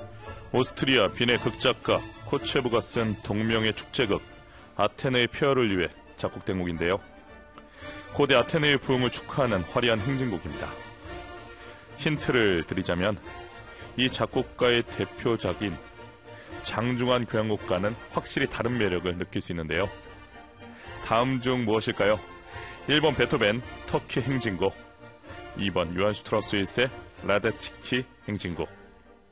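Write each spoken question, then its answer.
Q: 다음 중 무엇일까요? 1번 베토벤 터키 행진곡, 2번 요한 슈트라우스 1세 라데츠키 행진곡.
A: 1: 베토벤 터키 행진곡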